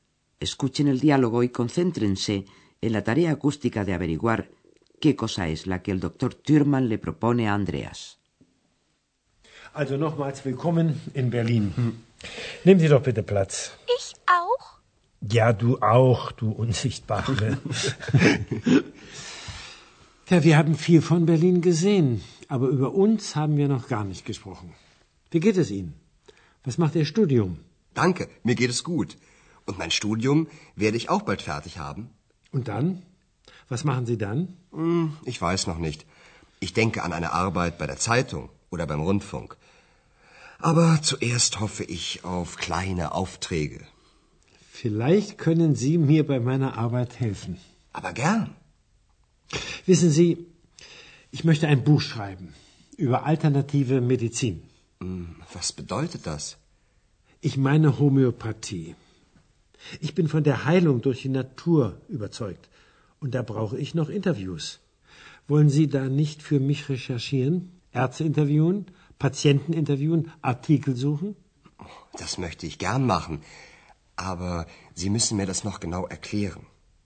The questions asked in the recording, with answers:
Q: Escuchen el diálogo y concéntrense en la tarea acústica de averiguar qué cosa es la que el doctor Thürmann le propone a Andreas.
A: El doctor Thurman le ha propuesto a Andreas, camuflándolo como pregunta, que le ayude en la tarea de investigación para un libro que quiere escribir sobre homeopatía, medicina alternativa.